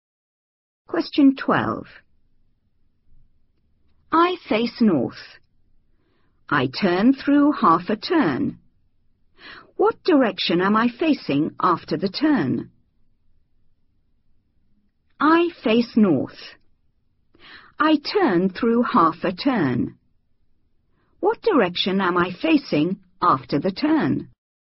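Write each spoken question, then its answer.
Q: What direction am I facing after the turn?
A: South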